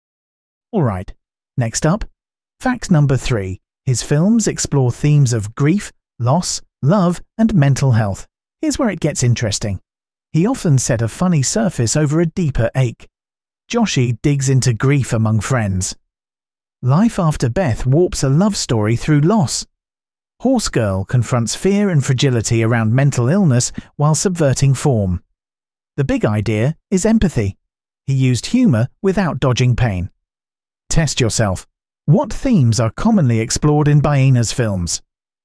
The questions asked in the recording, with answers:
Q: What themes are commonly explored in Boehner's films?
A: grief, loss, love, and mental health.